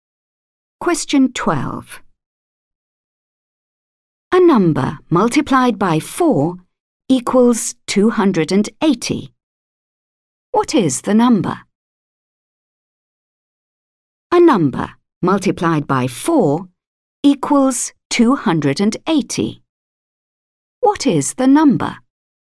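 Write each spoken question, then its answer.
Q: What is the number?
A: 70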